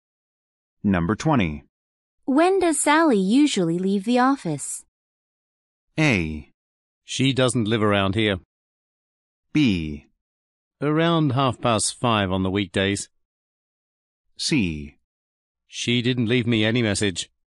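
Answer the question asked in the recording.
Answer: B: Around 5:30 on the weekdays.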